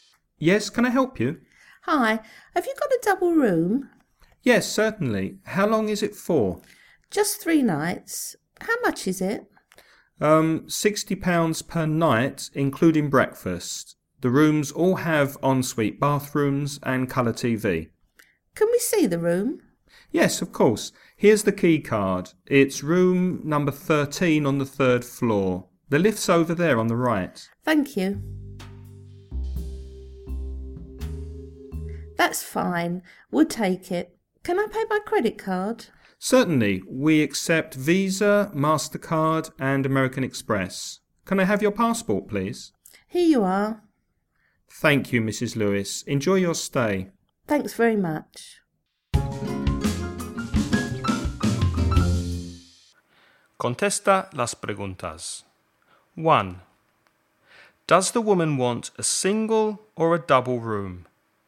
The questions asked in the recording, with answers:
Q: Does the woman want a single or a double room?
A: A double room.